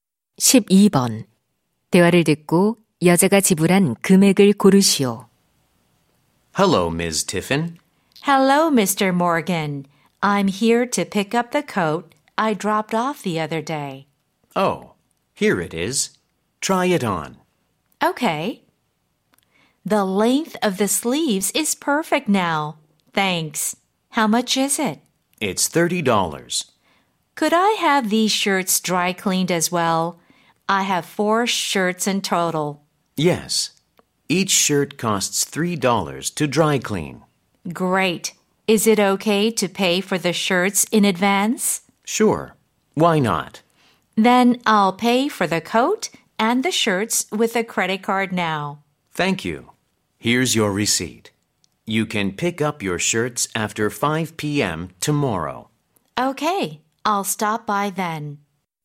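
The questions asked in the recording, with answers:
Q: 대화를 듣고 여자가 지불한 금액을 고르시오.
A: $42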